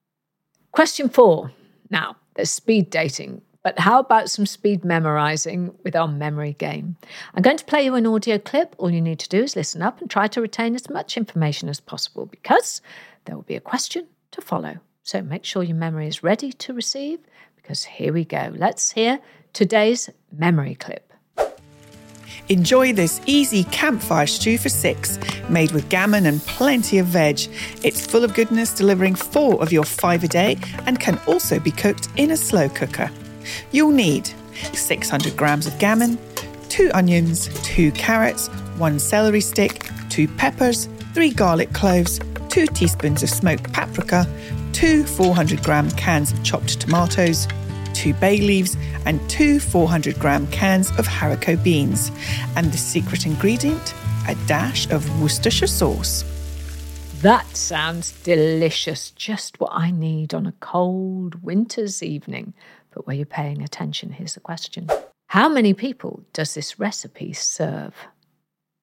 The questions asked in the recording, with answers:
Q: How many people does this recipe serve?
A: the recipe serves 6 people.